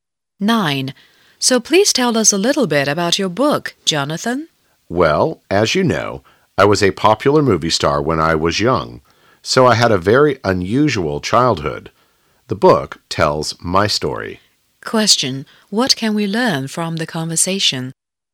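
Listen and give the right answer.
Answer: Jonathan, a former child movie star, wrote a book about his childhood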